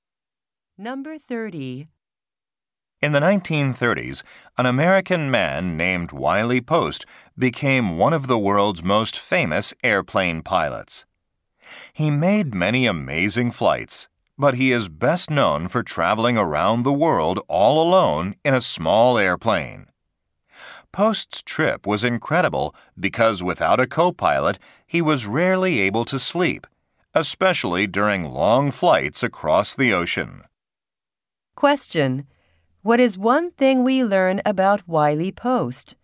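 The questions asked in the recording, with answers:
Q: What is one thing we learn about Wiley Post?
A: He flew around the world alone in a small airplane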